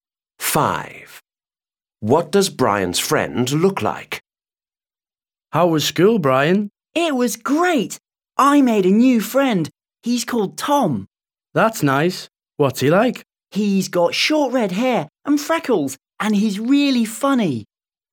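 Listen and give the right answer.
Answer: He has short red hair and freckles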